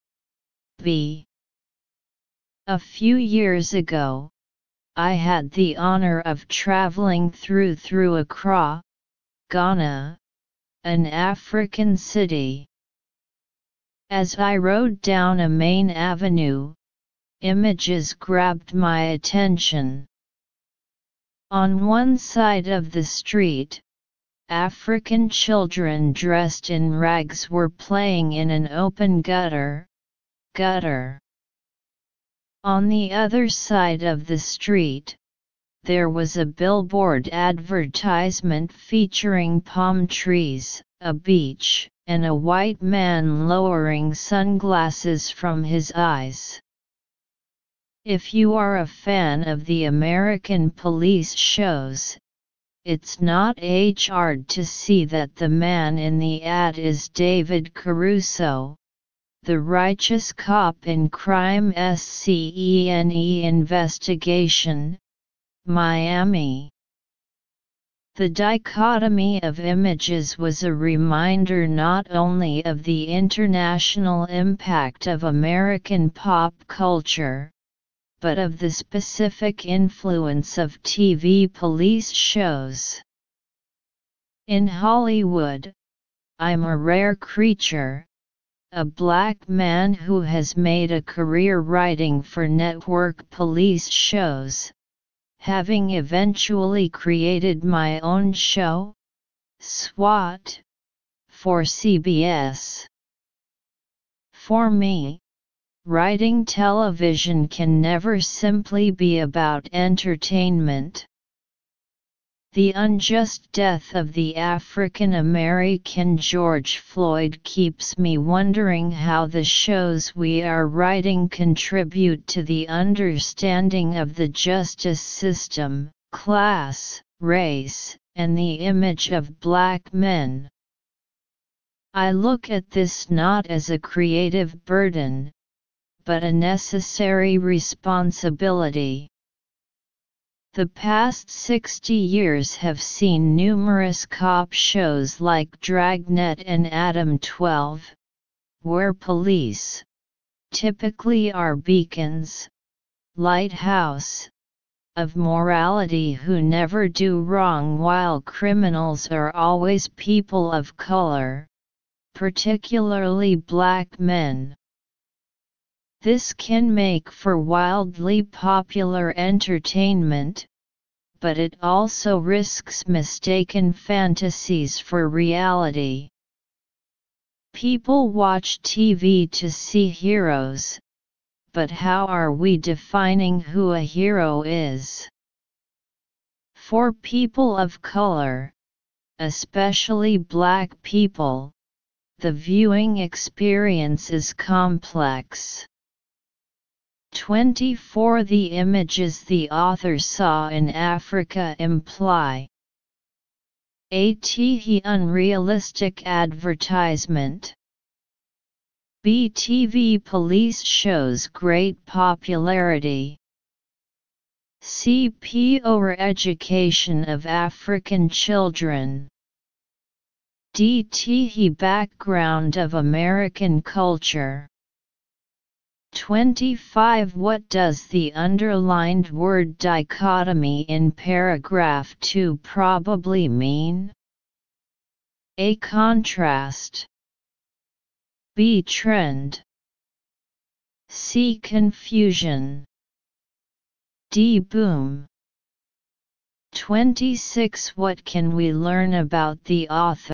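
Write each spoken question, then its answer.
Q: The images the author saw in Africa imply a TV unrealistic advertisement, b TV police shows great popularity, c poor education of African children, d TV background of American culture.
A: B: TV police shows great popularity

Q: What does the underlined word dichotomy in paragraph 2 probably mean?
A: A: Contrast.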